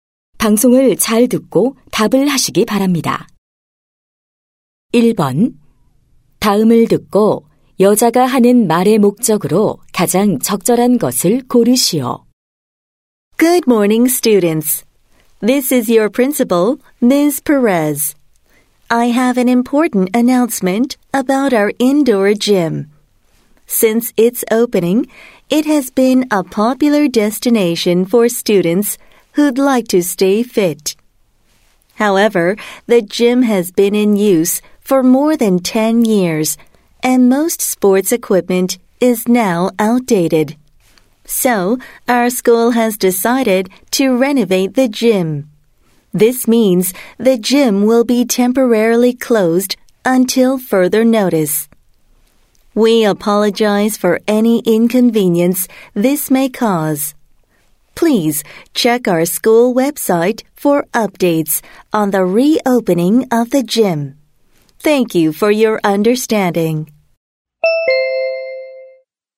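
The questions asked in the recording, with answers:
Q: 다음을 듣고 여자가 하는 말의 목적으로 가장 적절한 것을 고르시오.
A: 실내 체육관 리모델링으로 인한 임시 폐쇄를 알리려고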